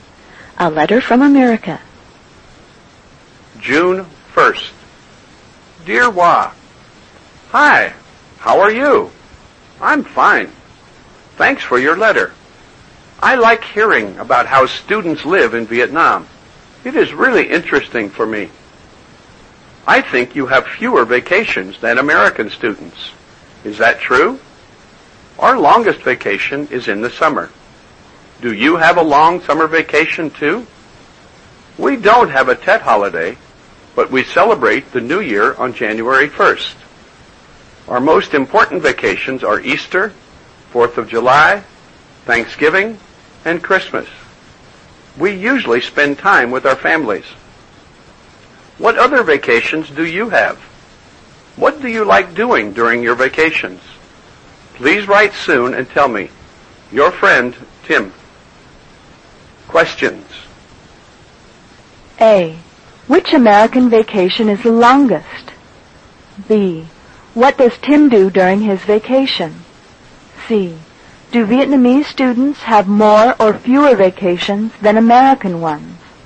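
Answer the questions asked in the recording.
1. The summer vacation
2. He usually spends time with his family
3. Fewer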